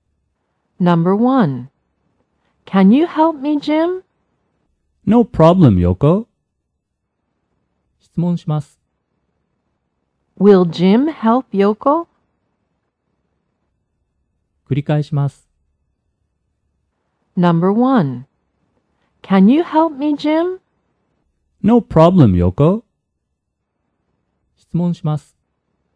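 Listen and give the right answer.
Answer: Yes, he will.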